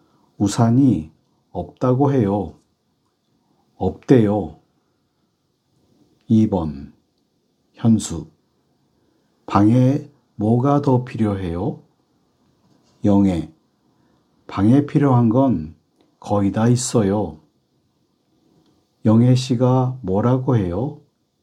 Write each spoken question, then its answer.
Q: 영예 씨가 뭐라고 해요?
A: 방에 필요한 건 거의 다 있다고 해요. 있대요.